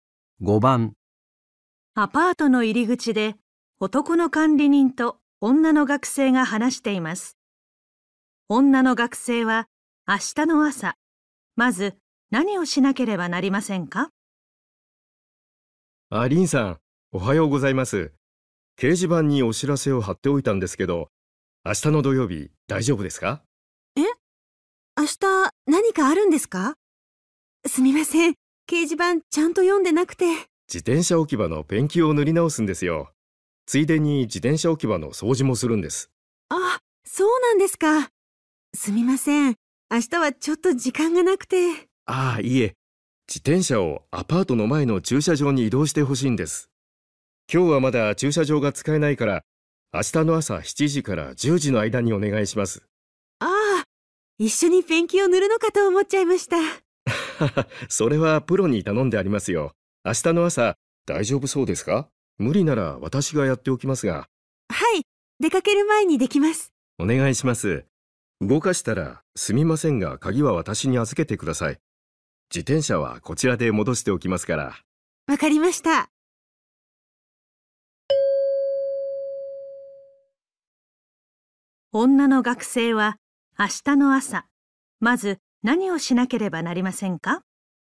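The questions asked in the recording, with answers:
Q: 女の学生は、明日の朝、まず何をしなければなりませんか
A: 自転車を駐車場に移動する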